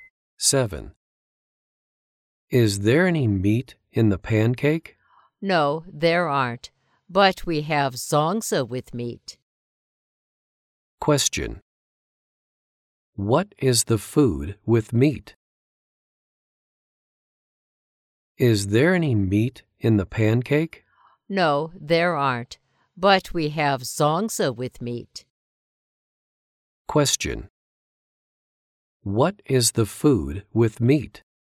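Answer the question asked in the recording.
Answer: Zongzi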